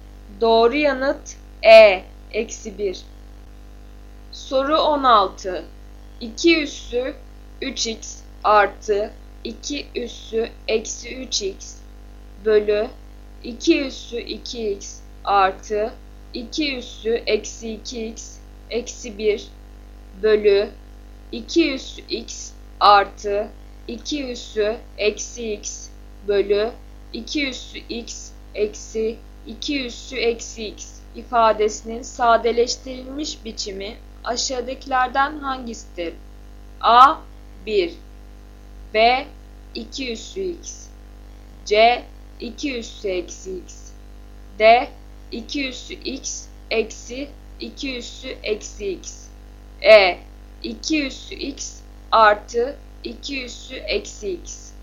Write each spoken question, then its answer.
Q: ifadesinin sadeleştirilmiş biçimi aşağıdakilerden hangisidir?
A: Doğru yanıt D. 2 üssü x eksi 2 üssü eksi x.